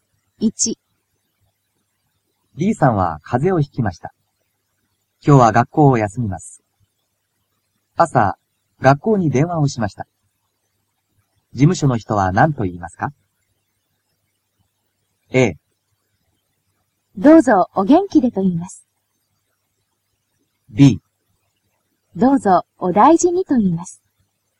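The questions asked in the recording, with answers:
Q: 事務所の人は何と言いますか?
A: B: どうぞお大事にと言います。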